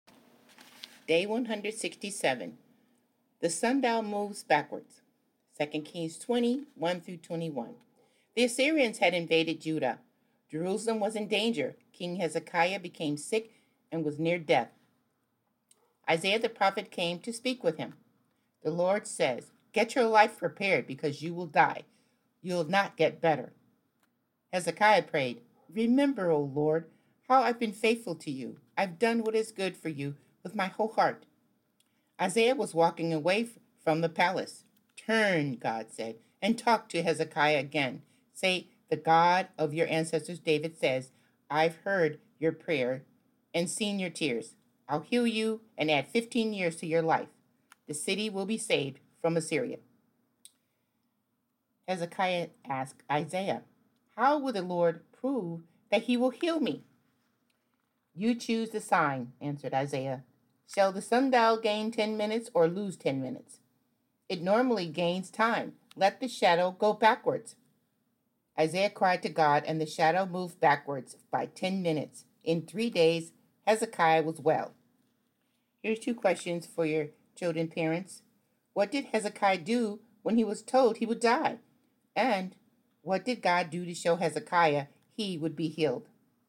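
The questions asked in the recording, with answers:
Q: What did Hezekiah do when he was told he would die?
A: He prayed to the Lord.

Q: And what did God do to show Hezekiah he would be healed?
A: He made the shadow on the sundial move backwards by 10 minutes.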